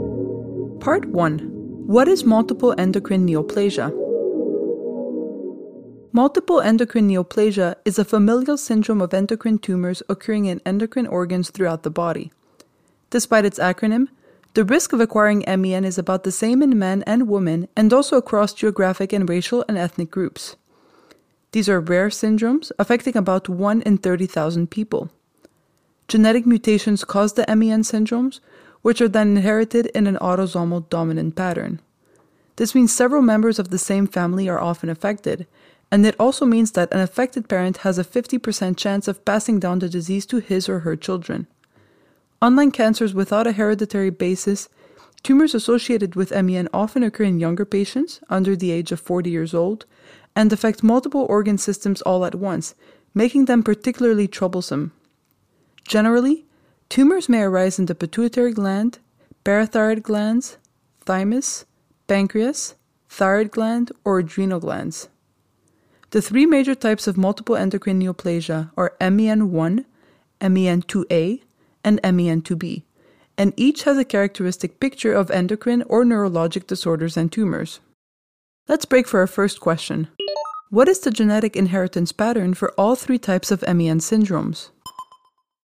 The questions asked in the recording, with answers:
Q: What is the genetic inheritance pattern for all three types of MEN syndromes?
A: MEN is inherited in an autosomal dominant pattern, which means several members of the same family can be affected, and an affected parent has a 50% chance of passing it down to offspring.